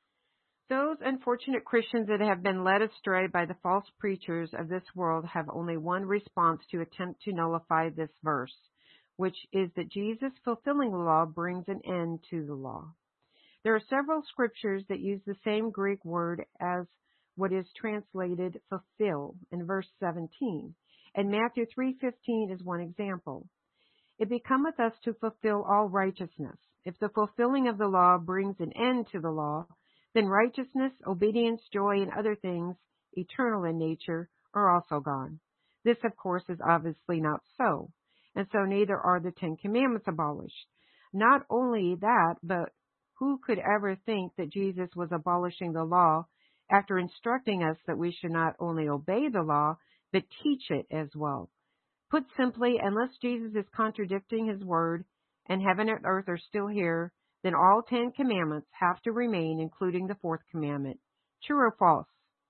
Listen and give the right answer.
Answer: The answer is true.